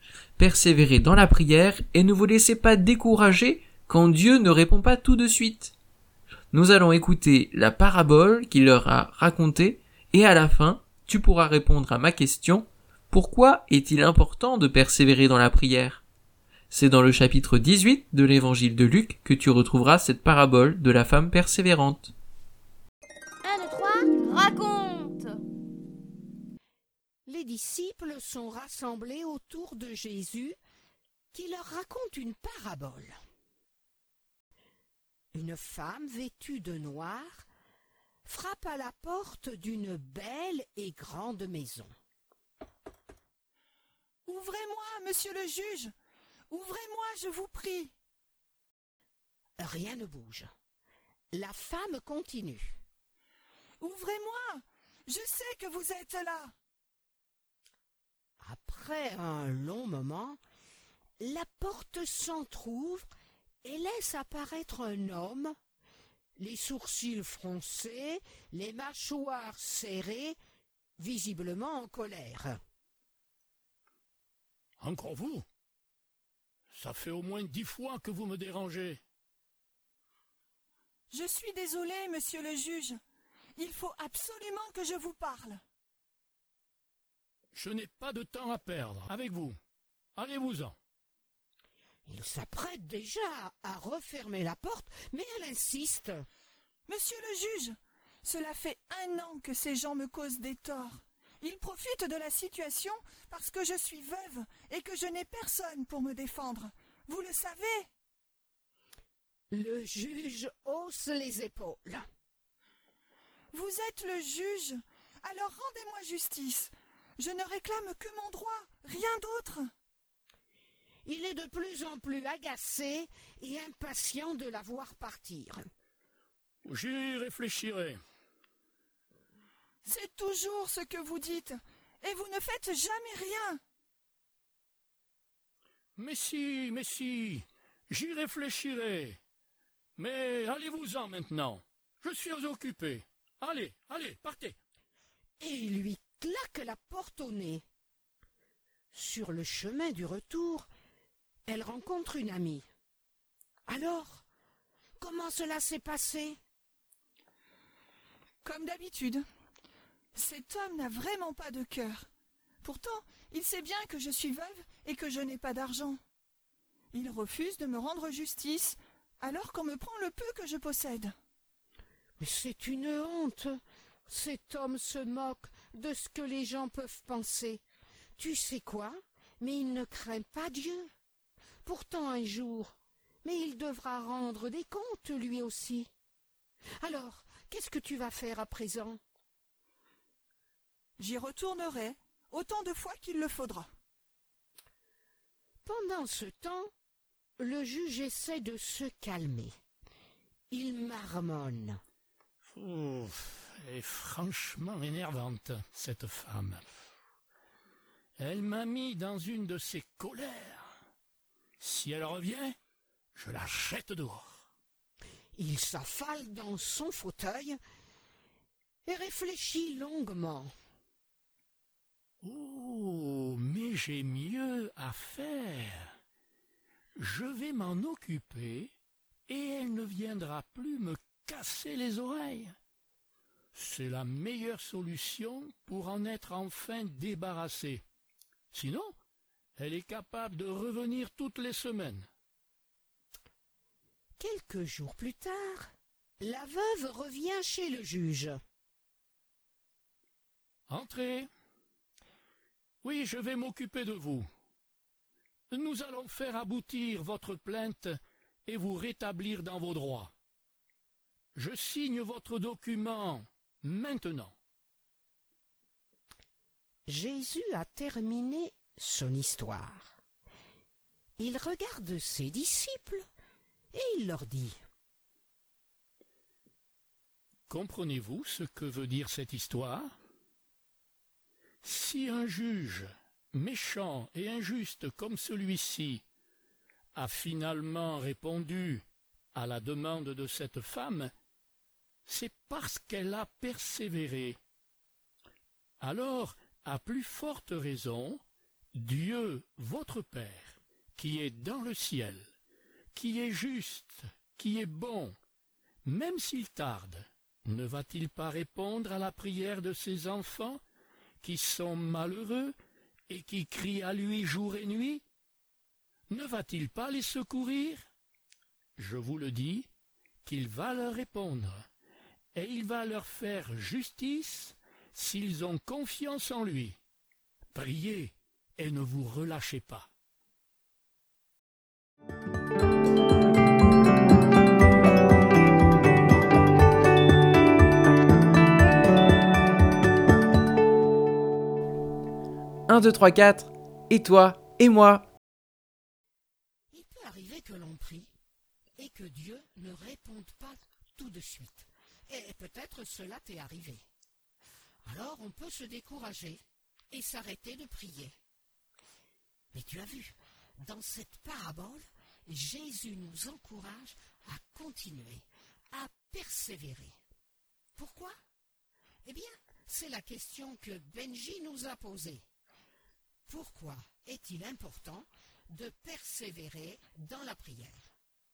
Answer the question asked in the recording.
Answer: Eh bien, parce que Dieu, notre Père qui est dans le ciel, est bon et juste.